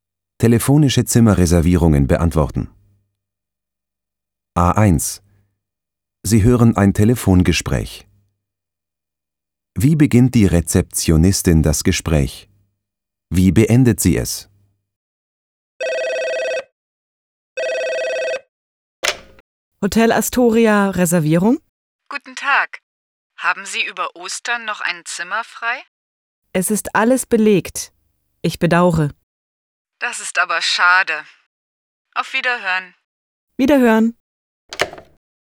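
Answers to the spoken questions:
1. Hotel Astoria, Reservierung?
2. Wiederhören.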